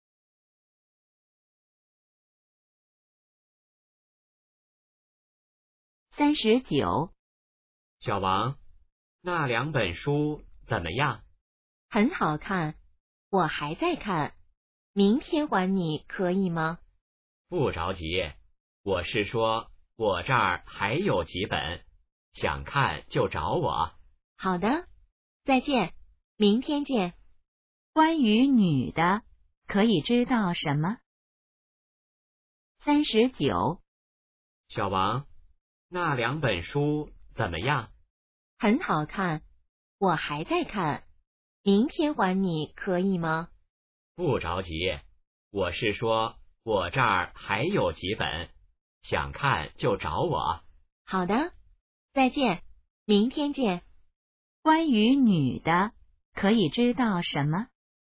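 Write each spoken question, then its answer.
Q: 关于女的,可以知道什么?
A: 书还没看完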